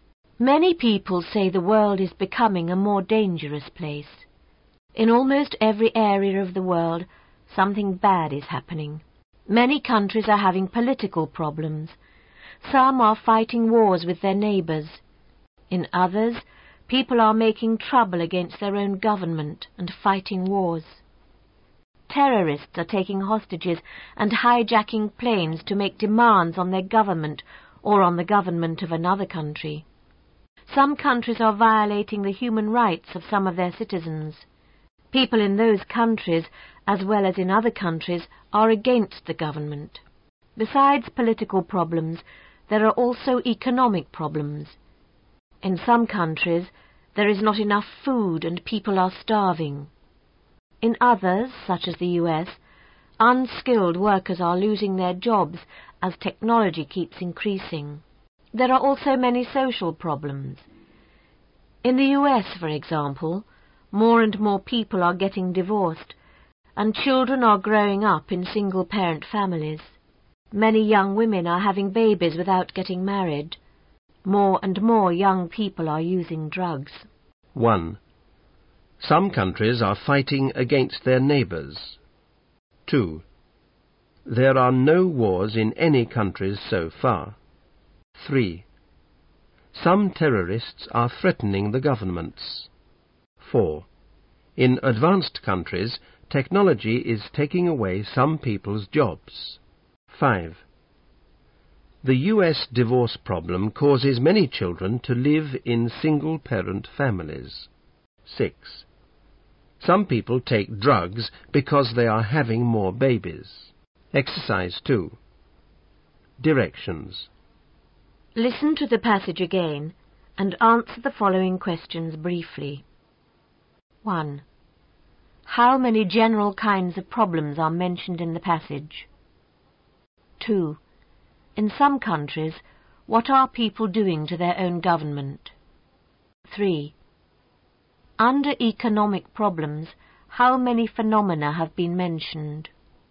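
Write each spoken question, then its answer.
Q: How many general kinds of problems are mentioned in the passage?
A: Three: political, economic and social

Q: In some countries, what are people doing to their own government?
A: Making trouble against it and fighting wars

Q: Under economic problems, how many phenomena have been mentioned?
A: Two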